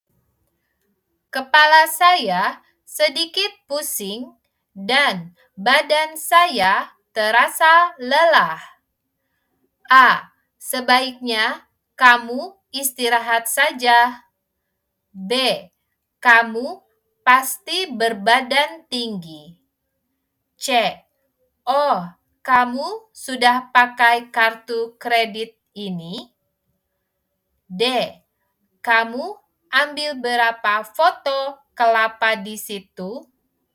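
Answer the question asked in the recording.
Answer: A: Sebaiknya kamu istirahat saja.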